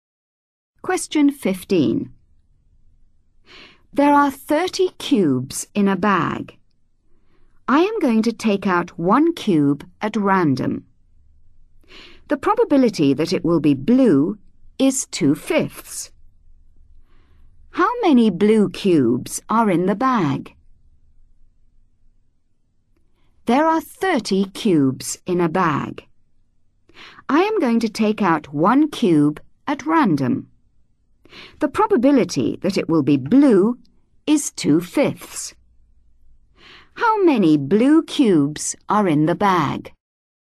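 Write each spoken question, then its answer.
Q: How many blue cubes are in the bag?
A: 12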